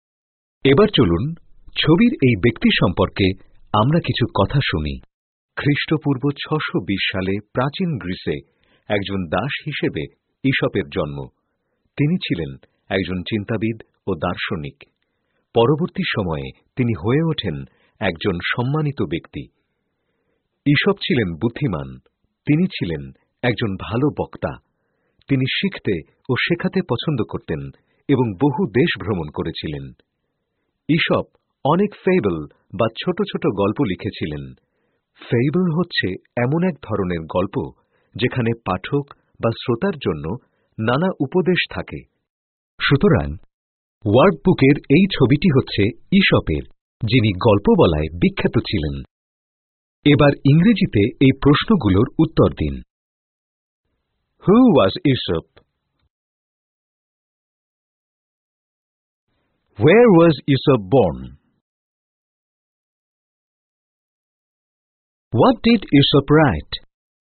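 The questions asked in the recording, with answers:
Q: হু ওয়াজ ঈশপ?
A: A thinker and philosopher, born a slave, who wrote fables

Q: হোয়ার ওয়াজ ঈশপ born?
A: In ancient Greece

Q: what ডিড ঈশপ right?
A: Fables (short stories with morals)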